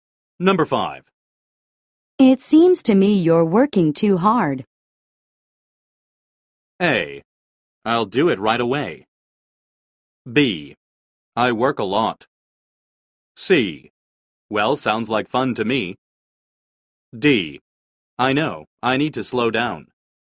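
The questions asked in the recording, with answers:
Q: It seems to me you're working too hard.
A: D: I know, I need to slow down.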